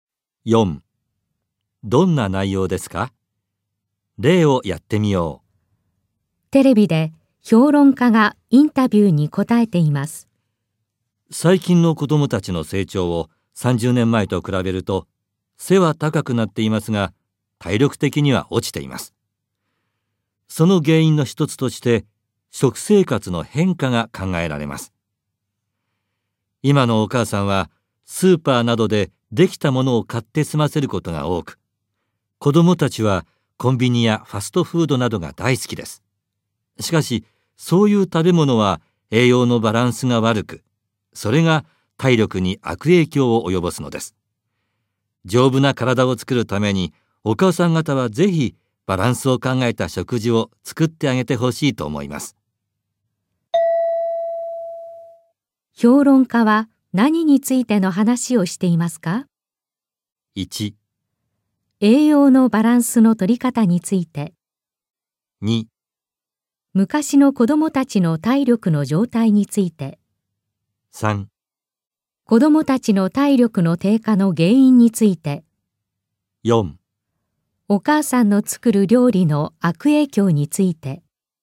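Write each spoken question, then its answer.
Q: 評論家は、何についての話をしていますか?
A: 3: 子どもたちの体力の低下の原因について。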